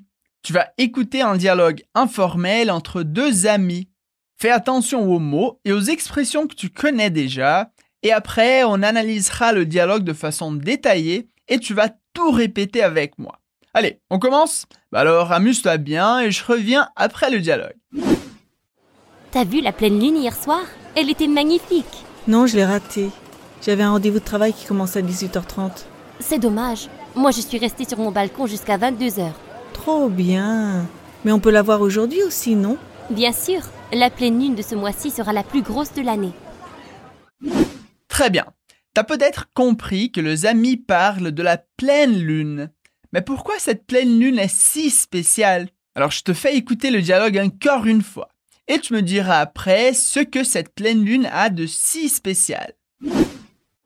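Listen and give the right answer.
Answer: La pleine lune de ce mois-ci sera la plus grosse de l'année.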